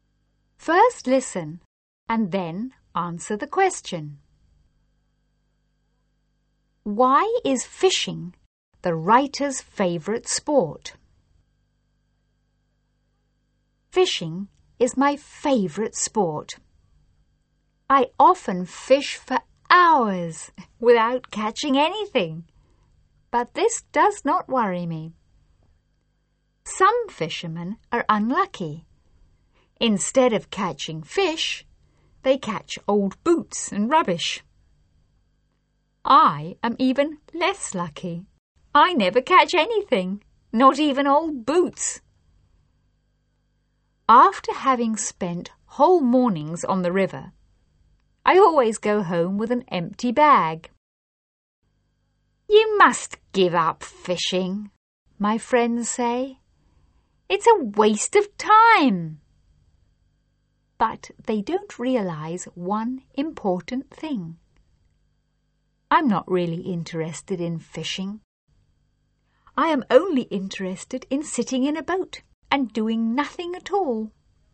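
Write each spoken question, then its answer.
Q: Why is fishing the writer's favourite sport?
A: Because he can sit in a boat and do nothing at all.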